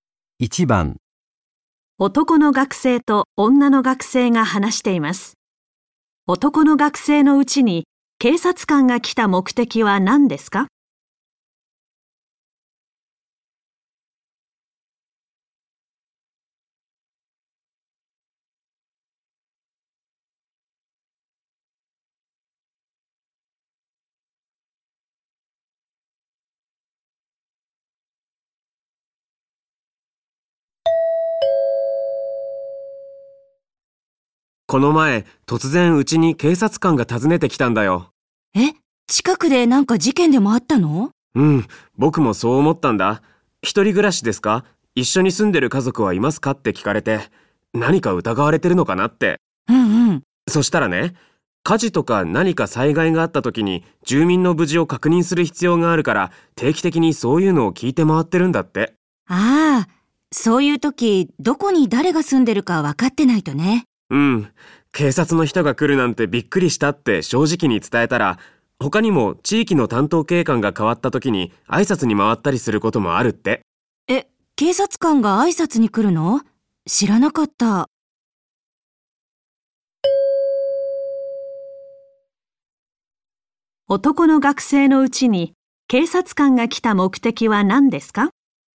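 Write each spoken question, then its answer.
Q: 男の学生のうちに警察官が来た目的は何ですか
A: 災害時に住民の無事を確認するため、住んでいる人を調べること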